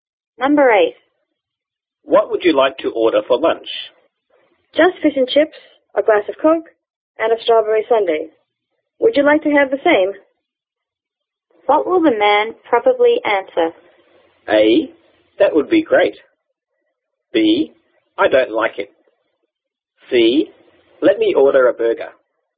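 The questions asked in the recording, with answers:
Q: What will the man probably answer?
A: A: That would be great.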